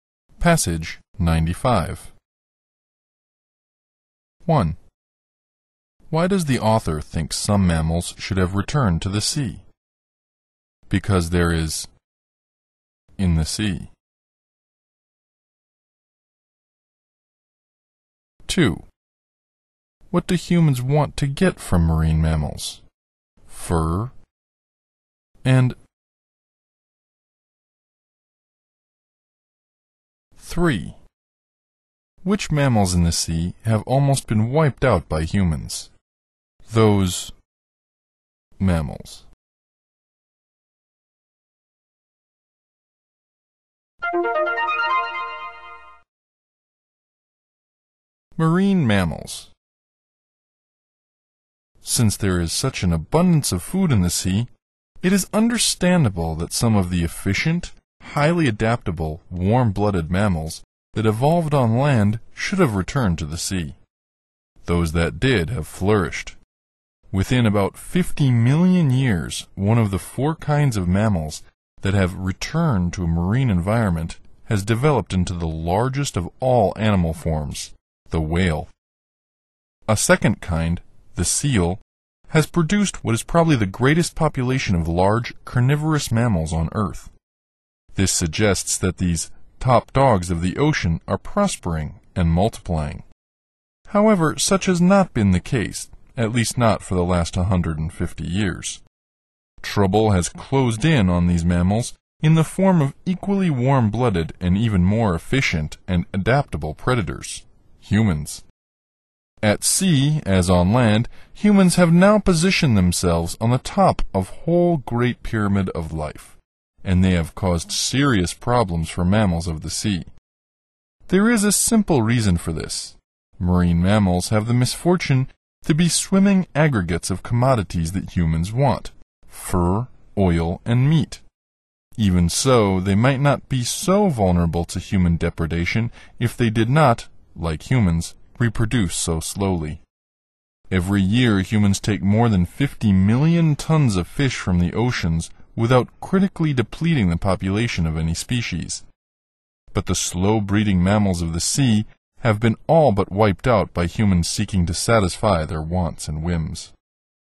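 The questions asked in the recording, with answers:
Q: Why does the author think some mammals should have returned to the sea?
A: Because there is an abundance of food in the sea.

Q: What do humans want to get from marine mammals?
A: Fur, oil, and meat.

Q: Which mammals in the sea have almost been wiped out by humans?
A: The slow-breeding mammals.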